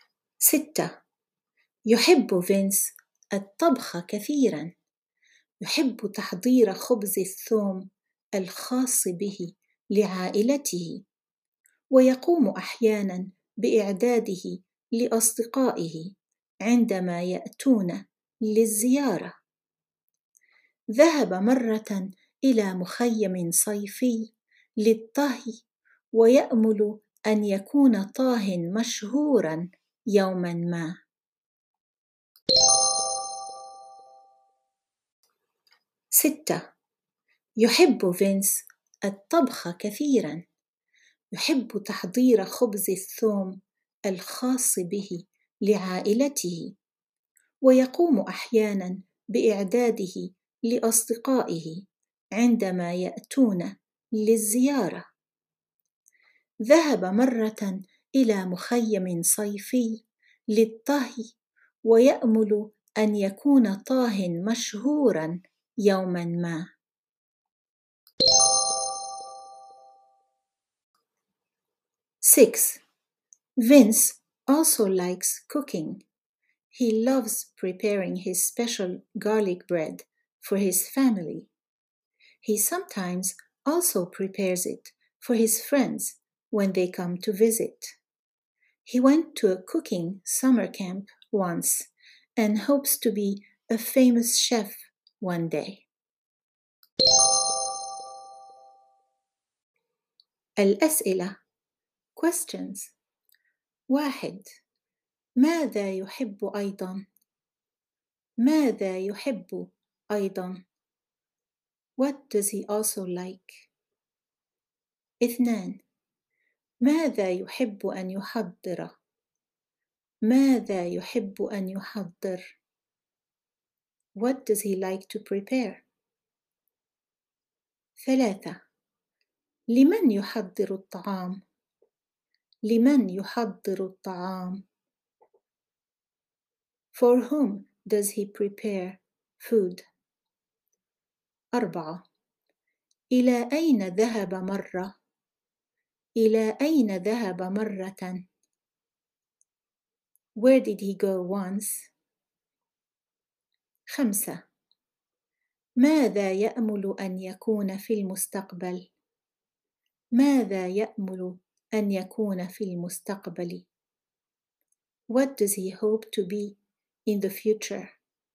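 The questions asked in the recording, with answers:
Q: ماذا يحب أيضا؟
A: الطبخ

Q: ماذا يحب أن يحضر؟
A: خبز الثوم الخاص به

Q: لمن يحضر الطعام؟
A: لعائلته وأحيانا لأصدقائه

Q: إلى أين ذهب مرة؟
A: إلى مخيم صيفي للطهي

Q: ماذا يأمل أن يكون في المستقبل؟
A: طاهيا مشهورا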